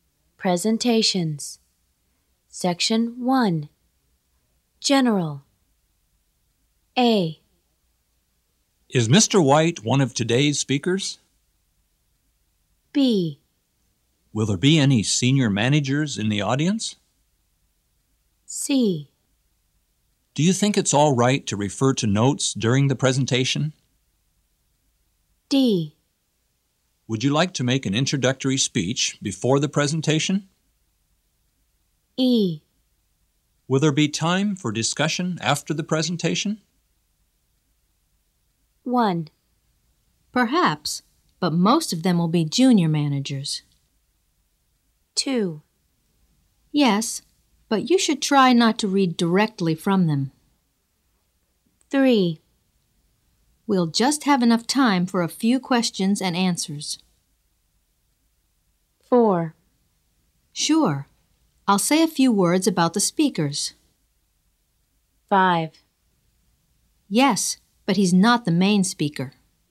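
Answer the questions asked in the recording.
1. 5: Yes, but he's not the main speaker.
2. 1: Perhaps, but most of them will be junior managers.
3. 2: Yes, but you should try not to read directly from them.
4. 4: Sure. I'll say a few words about the speakers.
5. 3: We'll just have enough time for a few questions and answers.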